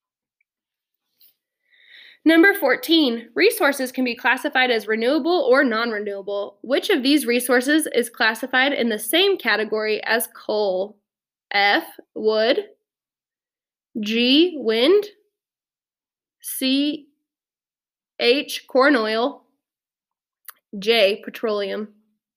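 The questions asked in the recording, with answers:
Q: Which of these resources is classified in the same category as coal?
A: J: petroleum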